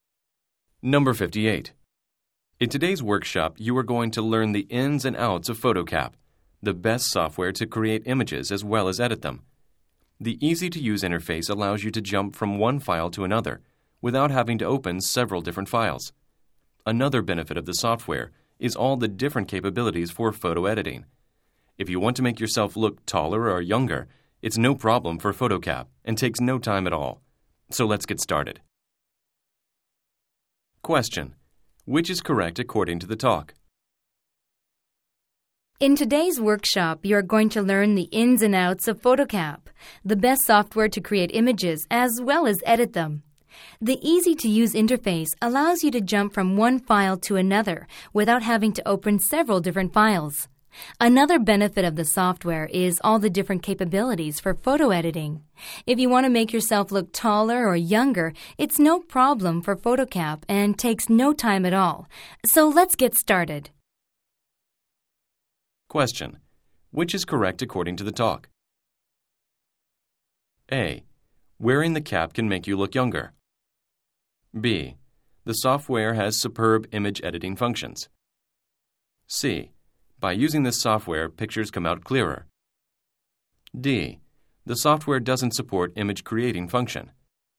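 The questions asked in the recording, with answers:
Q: which is correct according to the talk?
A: B: The software has superb image editing functions.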